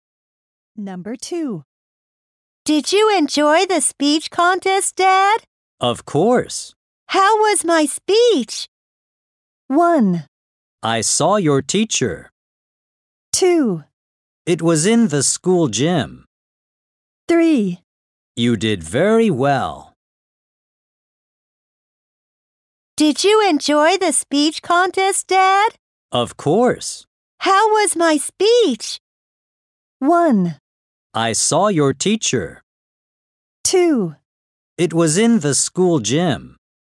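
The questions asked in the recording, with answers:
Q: How was my speech?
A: 3: You did very well.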